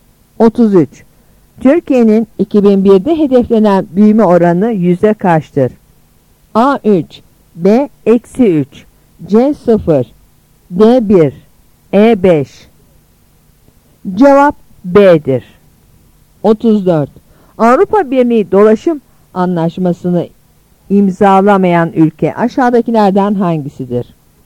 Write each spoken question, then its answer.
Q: Türkiye'nin 2001'de hedeflenen büyüme oranı yüzde kaçtır?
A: Cevap B'dir.